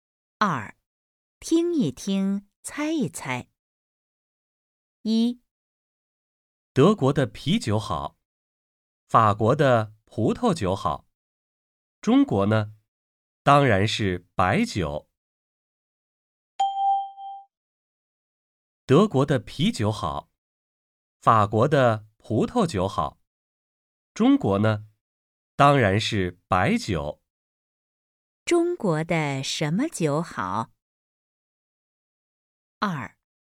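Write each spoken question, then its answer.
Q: 中国的什么酒好?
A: 白酒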